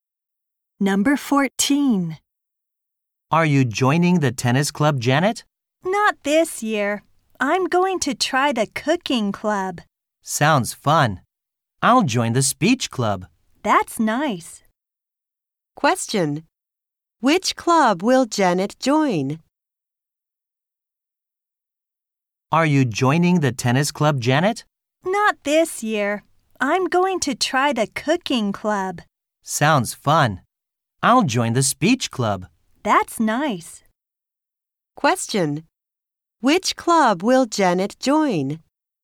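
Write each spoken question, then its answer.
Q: Which club will Janet join?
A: The cooking club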